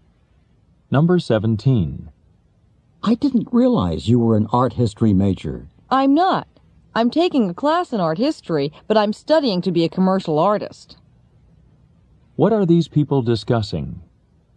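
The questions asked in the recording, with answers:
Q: What are these people discussing?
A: The man's field of study.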